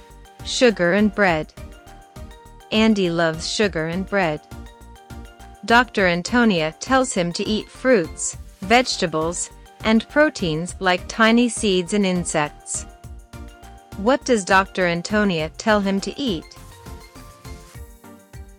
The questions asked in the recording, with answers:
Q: What does Dr. Antonia tell him to eat?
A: Fruits, vegetables, and proteins.